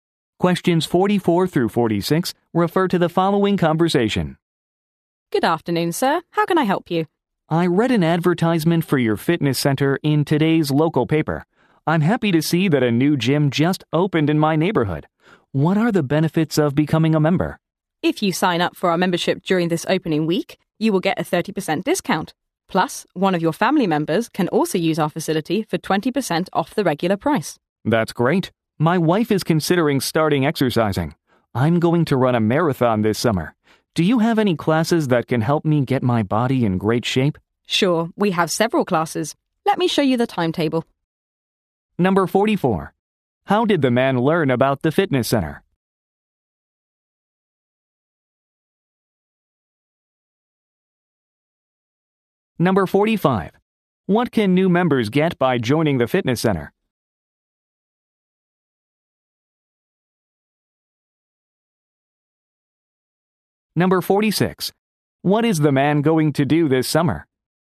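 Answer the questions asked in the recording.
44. From an ad in the local paper
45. A 30% discount
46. Run a marathon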